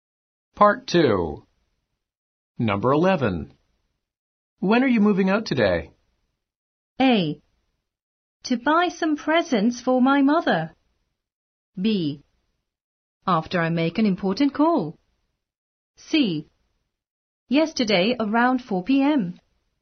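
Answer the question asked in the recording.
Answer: B: After I make an important call.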